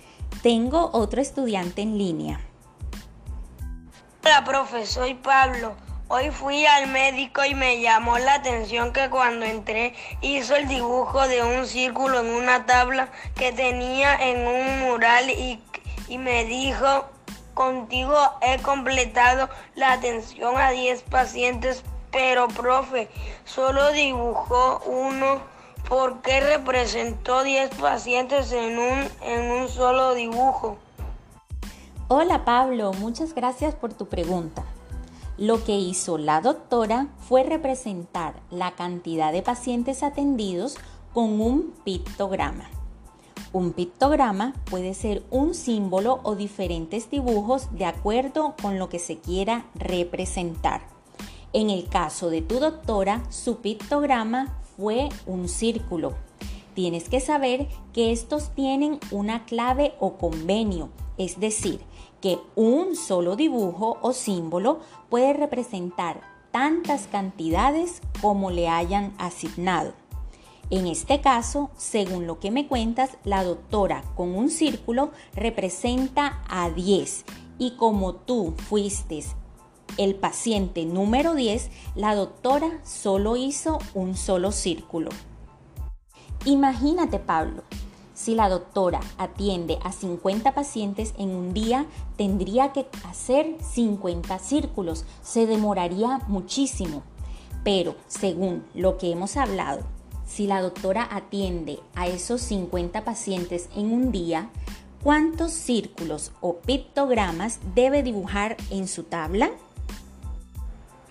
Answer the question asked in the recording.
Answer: pues debe hacer 5 círculos.